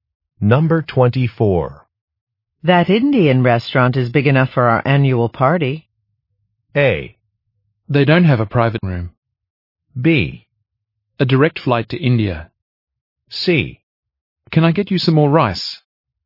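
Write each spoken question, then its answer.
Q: That Indian restaurant is big enough for our annual party.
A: A: They don't have a private room.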